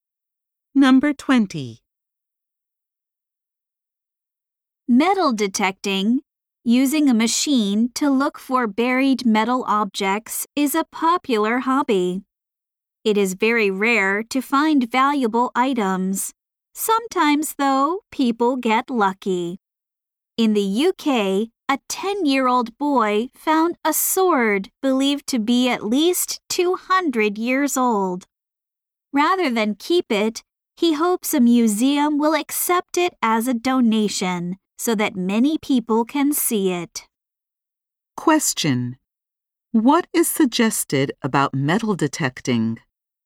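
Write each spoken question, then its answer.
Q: What is suggested about metal detecting?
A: It is very rare to find valuable items.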